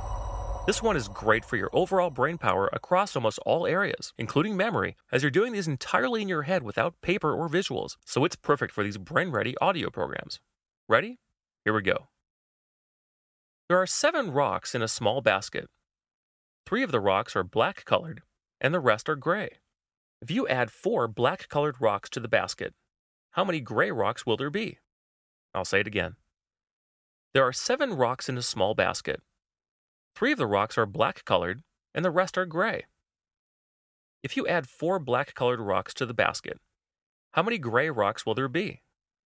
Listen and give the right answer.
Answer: Well, the correct answer is 4 gray rocks.